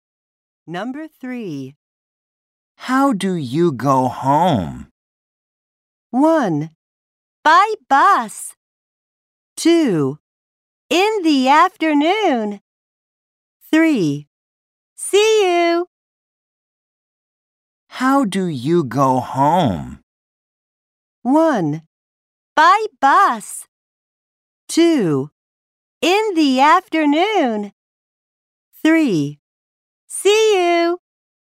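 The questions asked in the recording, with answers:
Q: How do you go home?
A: 1: By bus.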